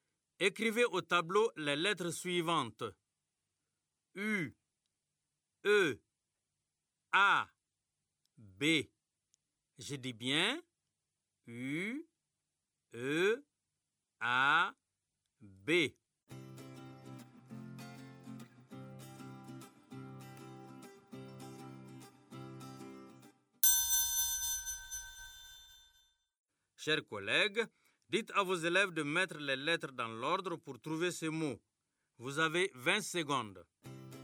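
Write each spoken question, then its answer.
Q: dites à vos élèves de mettre les lettres dans l'ordre pour trouver ce mot.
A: beau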